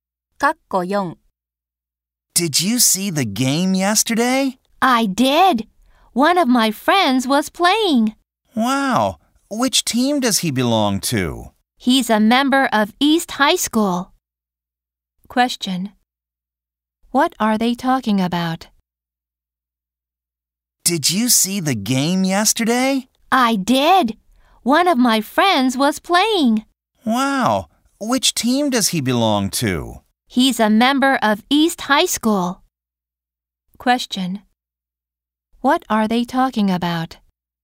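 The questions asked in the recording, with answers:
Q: What are they talking about?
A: Yesterday's game and a friend who played in it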